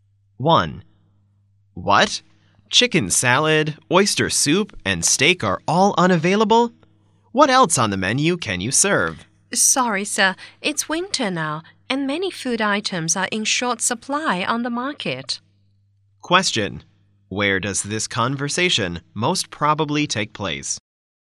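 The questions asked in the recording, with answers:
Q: Where does this conversation most probably take place?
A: In a restaurant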